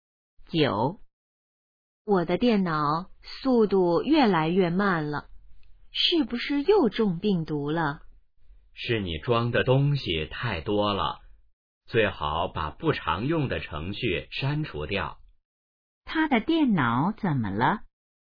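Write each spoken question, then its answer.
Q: 他的电脑怎么了?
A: 速度越来越慢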